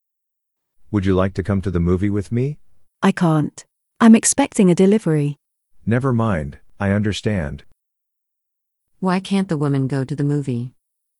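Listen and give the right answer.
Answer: She's expecting a delivery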